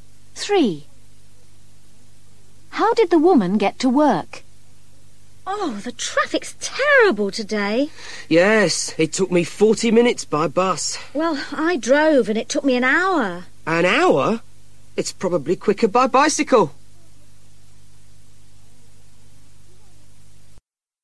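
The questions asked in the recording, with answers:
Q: How did the woman get to work?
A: By bus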